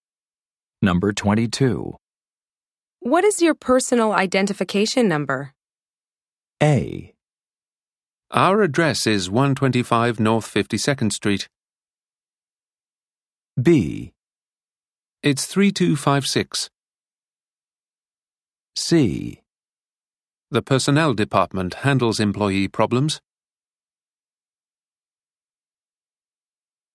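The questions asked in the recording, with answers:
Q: What is your personal identification number?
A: B: It's 3256.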